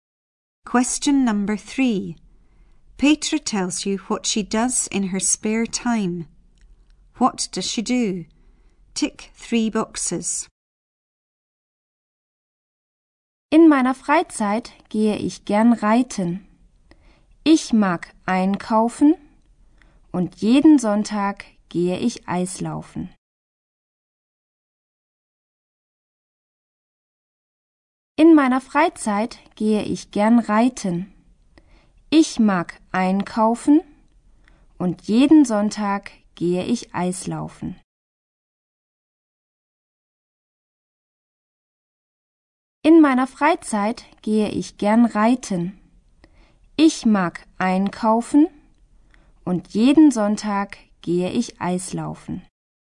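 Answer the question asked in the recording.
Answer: Horse riding, shopping, ice skating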